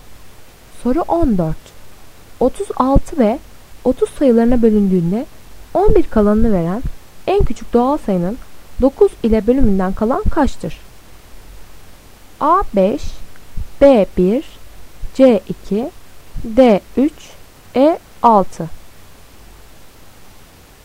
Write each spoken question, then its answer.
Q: 36 ve 30 sayılarına bölündüğünde 11 kalanını veren en küçük doğal sayının 9 ile bölümünden kalan kaçtır?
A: Doğru cevap C 2.